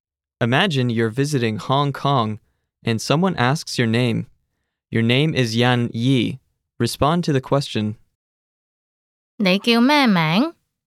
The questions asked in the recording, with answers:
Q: 你叫咩名?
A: 我叫欣怡。